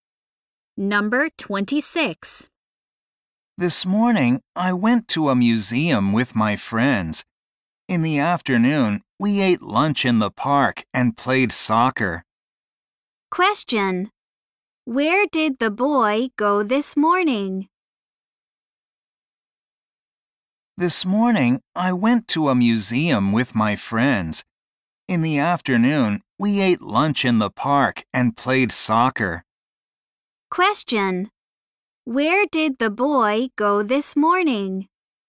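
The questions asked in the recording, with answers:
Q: Where did the boy go this morning?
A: To a museum (with his friends).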